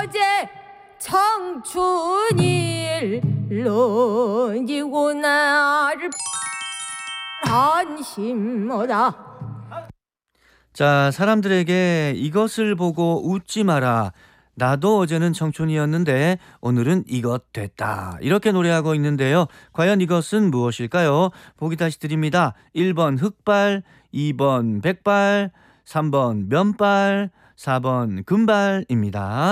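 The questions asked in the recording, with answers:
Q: 과연 이것은 무엇일까요?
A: 2: 백발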